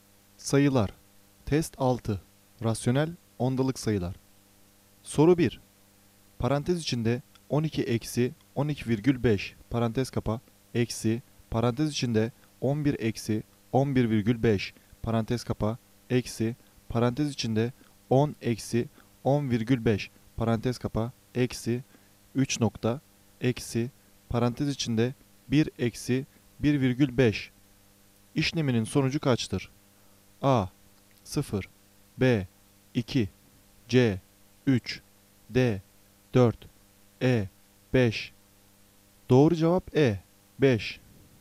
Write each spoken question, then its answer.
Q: Parantez içinde 12-12,5 parantez kapa eksi parantez içinde 11-11,5 parantez kapa eksi parantez içinde 10-10,5 parantez kapa eksi 3 nokta eksi parantez içinde 1-1,5 işleminin sonucu kaçtır?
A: Doğru cevap E 5